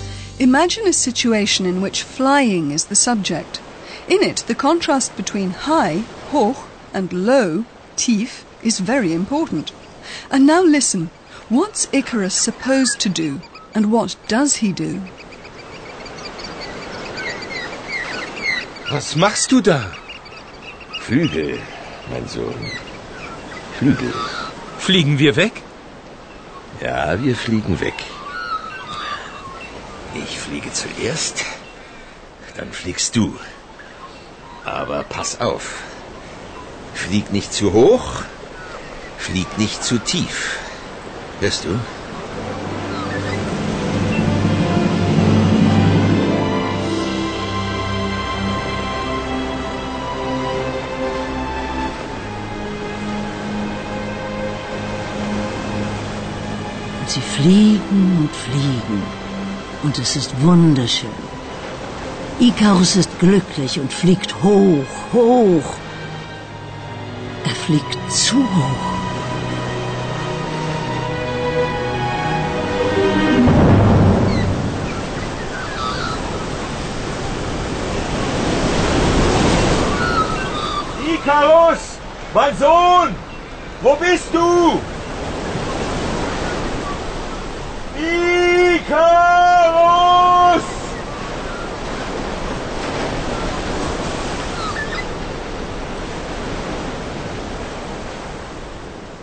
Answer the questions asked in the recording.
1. Icarus is not to fly too high.
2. and he flies too high.